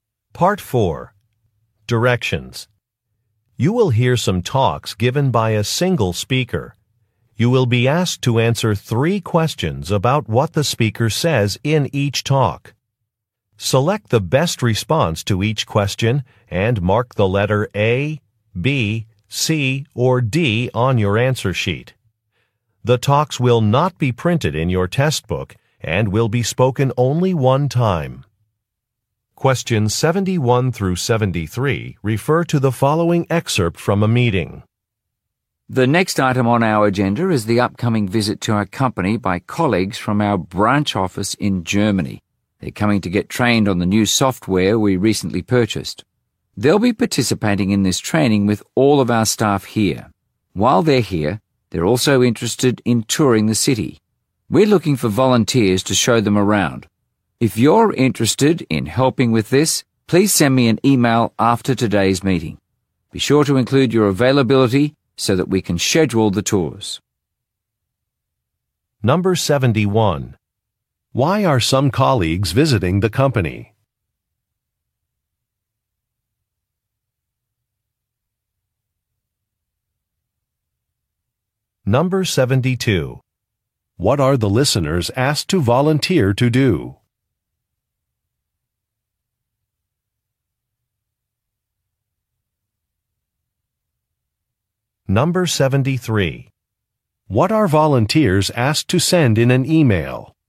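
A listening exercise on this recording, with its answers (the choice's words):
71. Why are some colleagues visiting the company?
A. To inspect a facility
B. To celebrate an anniversary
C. To make a presentation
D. To participate in a training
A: To participate in a training

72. What are the listeners asked to volunteer to do?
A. Give a city tour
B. Arrange transportation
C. Prepare some documents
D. Contact a catering service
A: Give a city tour

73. What are volunteers asked to send in an e-mail?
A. Their qualifications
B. Their availability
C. Contact information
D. A list of supplies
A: Their availability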